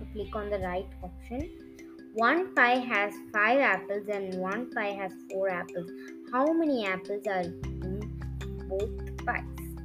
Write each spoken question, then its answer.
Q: How many apples are in both pies?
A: 5 plus 4. Easy. That is 9.